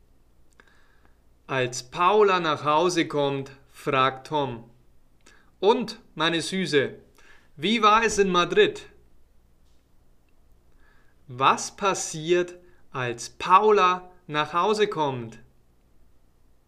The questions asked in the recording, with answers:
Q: Was passiert, als Paula nach Hause kommt?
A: Tom fragt, und meine Süße, wie war es in Madrid?